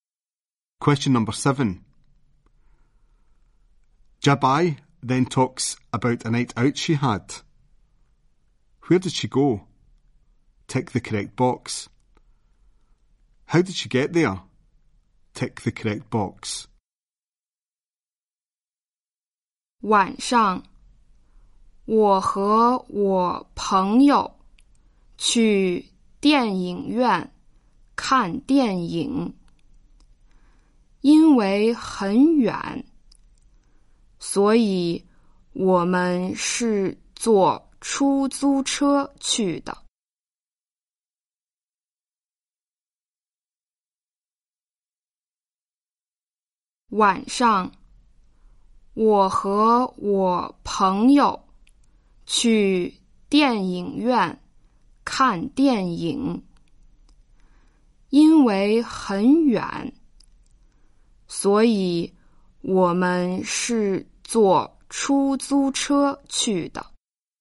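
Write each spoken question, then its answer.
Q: Where did she go? Tick the correct box.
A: To the cinema

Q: How did she get there? Tick the correct box.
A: By taxi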